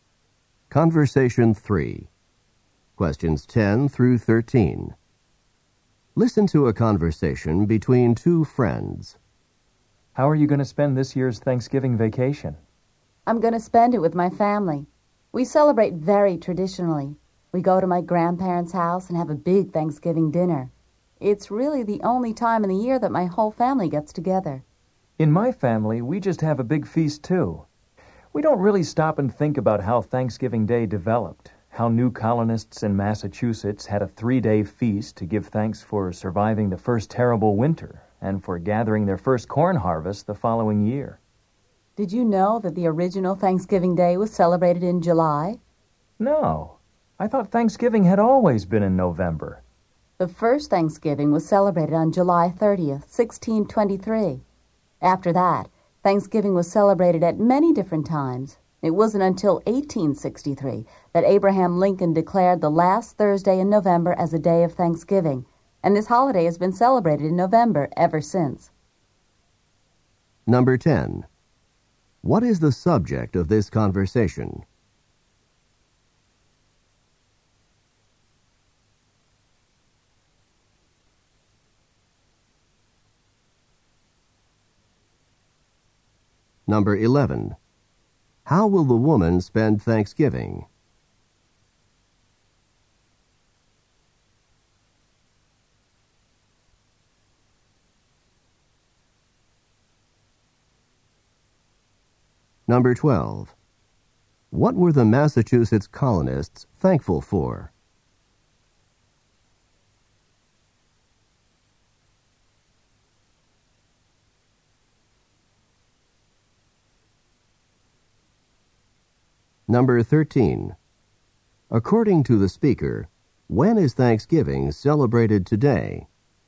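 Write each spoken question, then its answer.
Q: What is the subject of this conversation?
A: Thanksgiving and its history

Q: What were the Massachusetts colonists thankful for?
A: Surviving the first winter and their first corn harvest

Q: According to the speaker, when is Thanksgiving celebrated today?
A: The last Thursday in November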